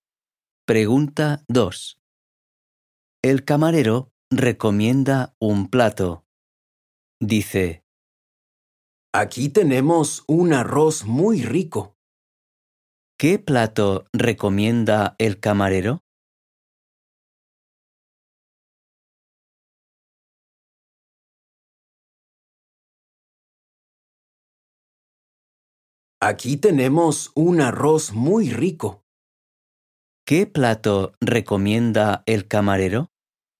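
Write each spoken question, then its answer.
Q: ¿Qué plato recomienda el camarero?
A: Arroz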